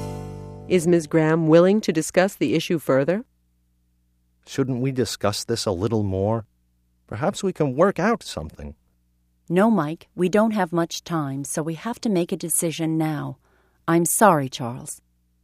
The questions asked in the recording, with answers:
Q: Is Ms. Graham willing to discuss the issue further?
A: No, she isn't. She feels that the decision has to be made now.